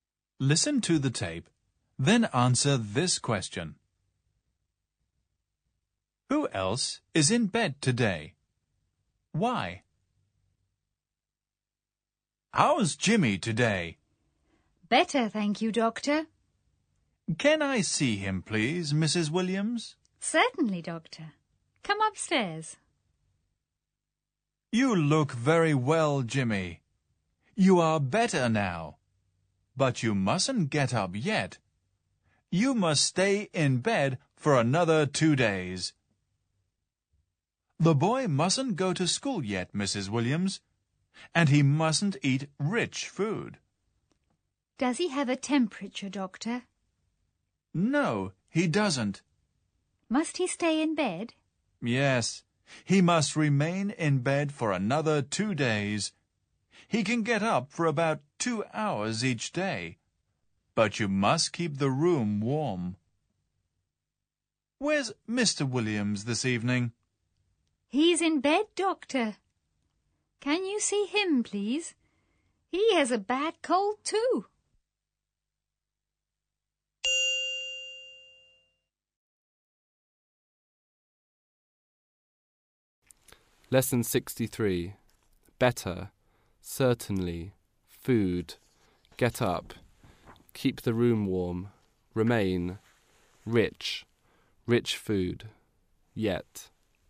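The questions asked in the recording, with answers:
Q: Who else is in bed today?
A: Mr. Williams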